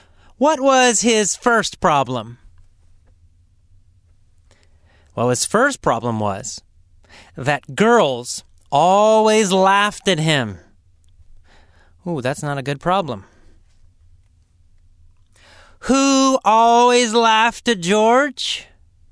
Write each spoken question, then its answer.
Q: Who always laughed at George?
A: Girls. All girls. All women.